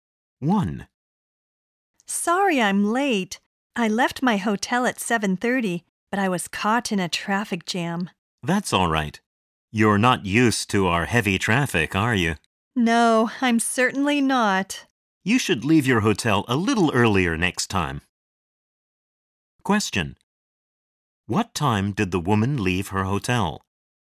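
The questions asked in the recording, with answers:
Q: What time did the woman leave her hotel?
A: At 7:30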